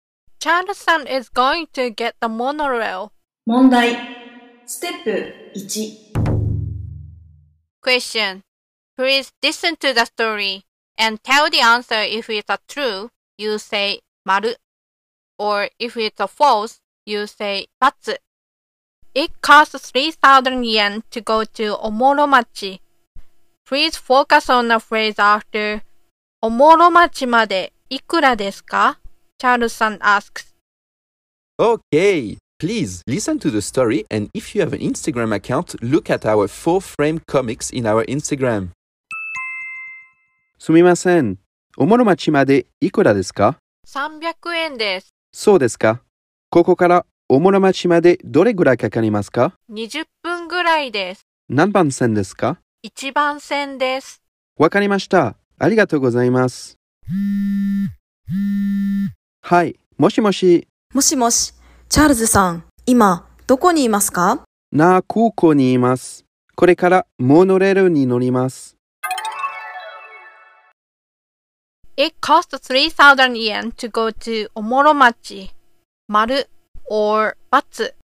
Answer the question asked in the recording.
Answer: So it's Batsu.